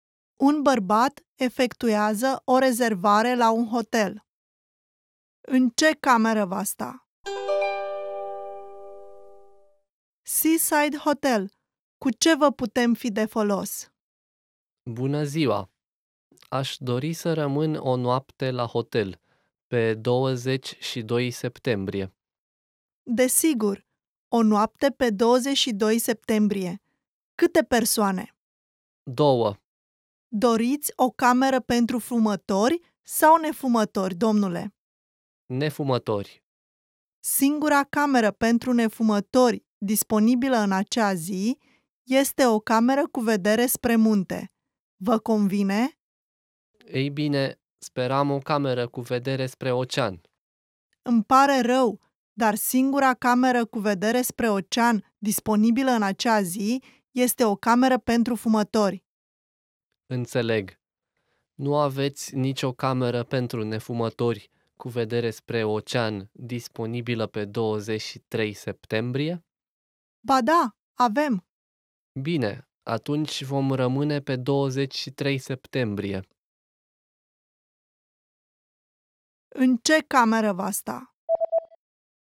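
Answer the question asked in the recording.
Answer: O cameră pentru nefumători cu vedere spre ocean, pe 23 septembrie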